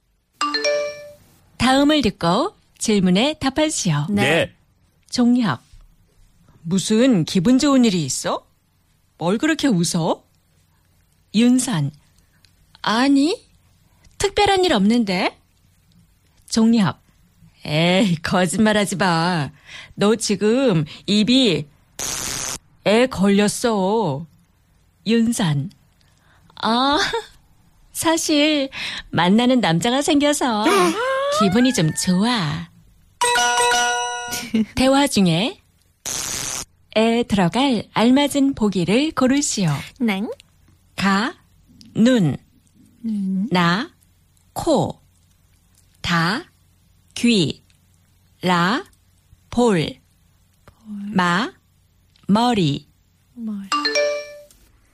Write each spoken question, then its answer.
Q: 대화 중에 에 들어갈 알맞은 보기를 고르시오.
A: 귀, ears. That was letter ta that we chose.